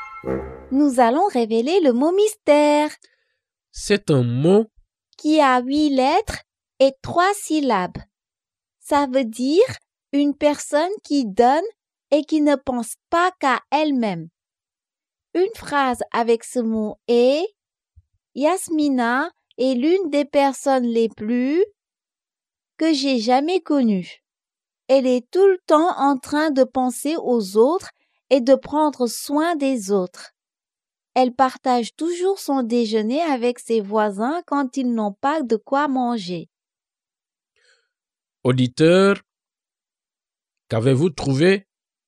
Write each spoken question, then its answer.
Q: Auditeur, qu'avez-vous trouvé?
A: Le mot mystère est généreux.